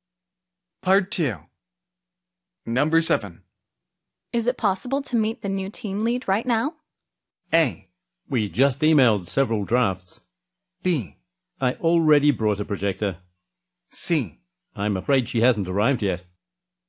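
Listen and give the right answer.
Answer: C: I'm afraid she hasn't arrived yet.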